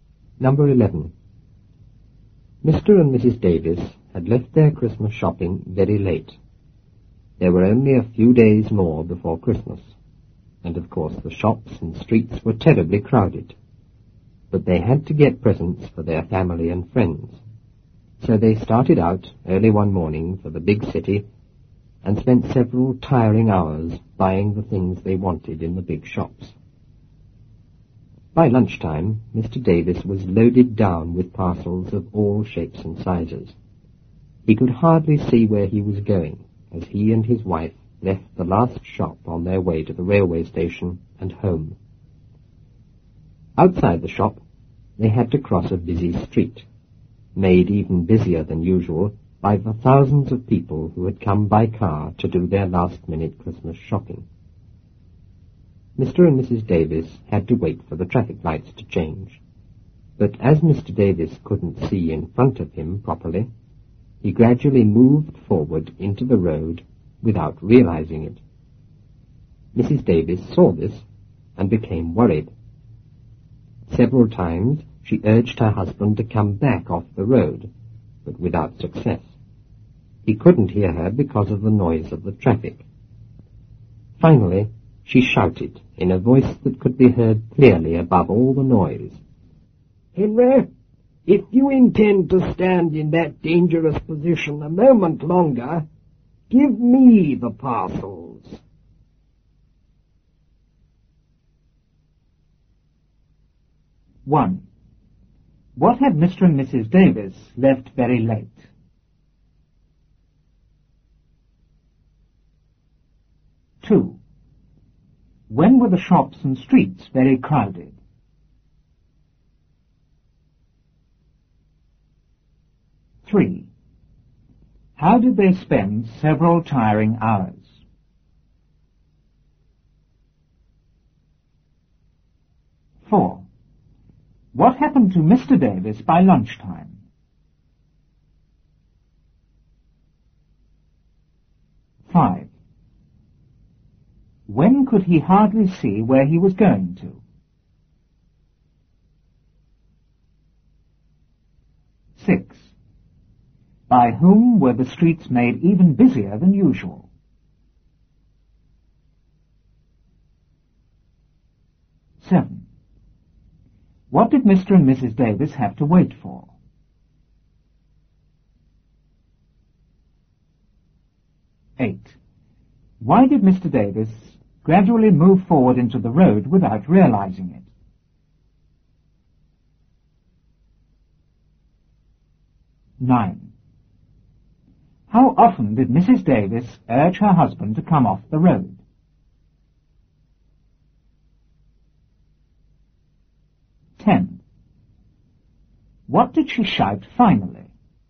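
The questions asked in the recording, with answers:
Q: What had Mr. and Mrs. Davis left very late?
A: Their Christmas shopping

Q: When were the shops and streets very crowded?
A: A few days before Christmas

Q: How did they spend several tiring hours?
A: Buying the things they wanted in the big shops

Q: What happened to Mr. Davis by lunchtime?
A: He was loaded down with parcels of all shapes and sizes

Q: When could he hardly see where he was going to?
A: As he and his wife left the last shop on their way to the station

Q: By whom were the streets made even busier than usual?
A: By thousands of people who had come by car to do last-minute Christmas shopping

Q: What did Mr. and Mrs. Davis have to wait for?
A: The traffic lights to change

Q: Why did Mr. Davis gradually move forward into the road without realizing it?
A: Because he couldn't see in front of him properly

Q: How often did Mrs. 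Davis urge her husband to come off the road?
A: Several times

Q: What did she shout finally?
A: "Henry, if you intend to stand in that dangerous position a moment longer, give me the parcels."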